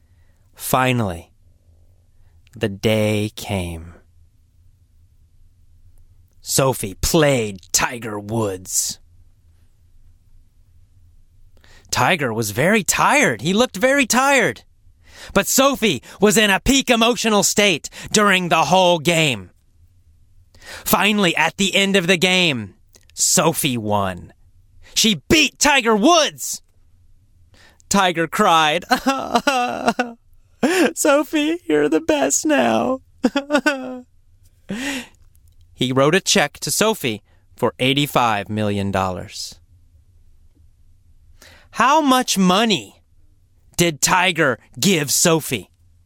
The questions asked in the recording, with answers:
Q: How much money did Tiger give Sophie?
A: $85 million.